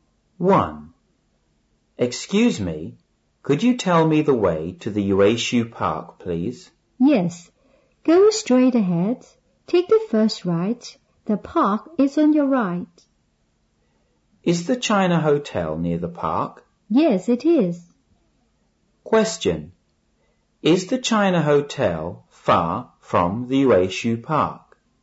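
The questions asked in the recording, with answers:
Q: Is the China Hotel far from the Yueshu Park?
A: No, it isn't.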